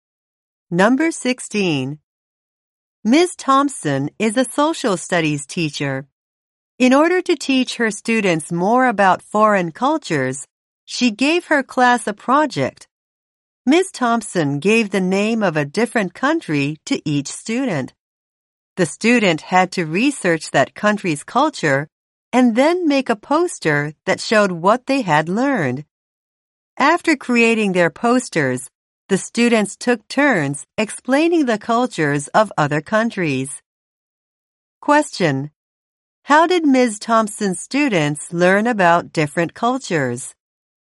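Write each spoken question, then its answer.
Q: How did Ms. Thompson's students learn about different cultures?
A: By researching a country's culture and making posters about it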